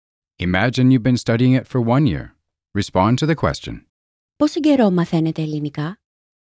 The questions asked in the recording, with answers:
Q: Πόσο καιρό μαθαίνετε ελληνικά?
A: Για ένα χρόνο.